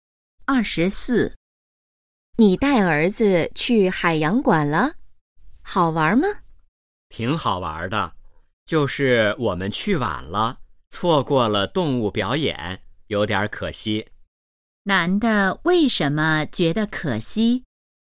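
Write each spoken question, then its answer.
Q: 男的为什么觉得可惜?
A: 错过了动物表演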